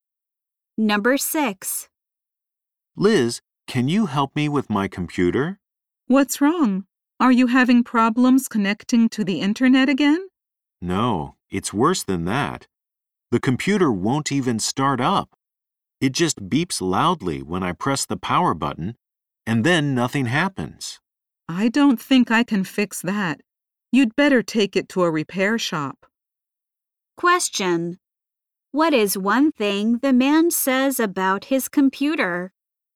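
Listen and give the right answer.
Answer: It won't start up; it just beeps.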